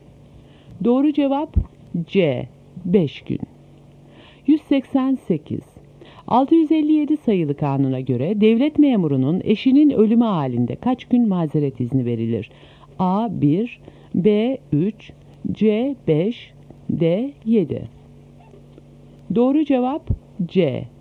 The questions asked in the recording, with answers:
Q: 657 sayılı kanuna göre devlet memurunun eşinin ölümü halinde kaç gün mazeret izni verilir?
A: Doğru cevap C.